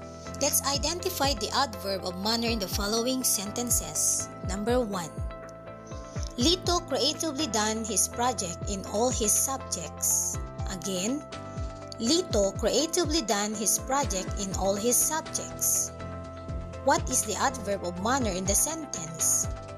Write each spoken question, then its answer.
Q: What is the adverb of manner in the sentence?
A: Yes, creatively.